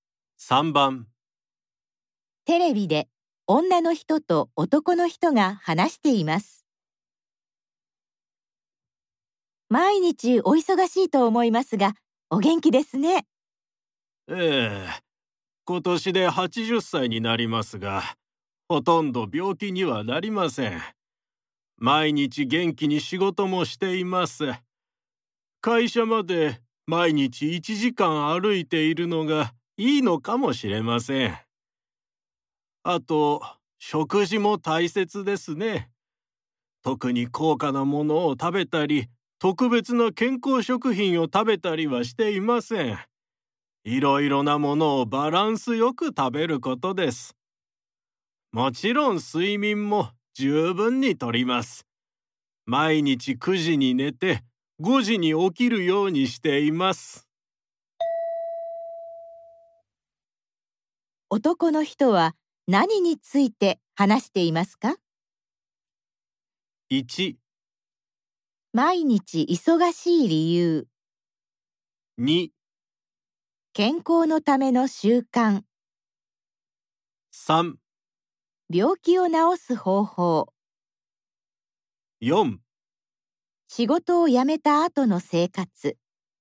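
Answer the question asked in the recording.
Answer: 2: 健康のための習慣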